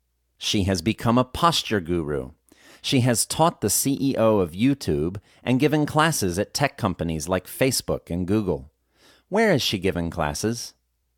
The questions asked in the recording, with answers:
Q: Where is she giving classes?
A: She has given classes at tech companies like Facebook and Google.